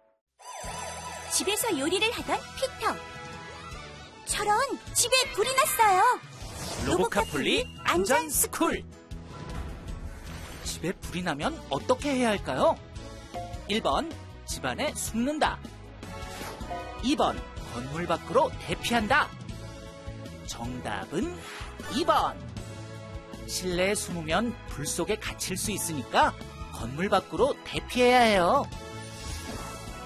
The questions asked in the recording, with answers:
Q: 집에 불이 나면 어떻게 해야 할까요?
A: 정답은 2번.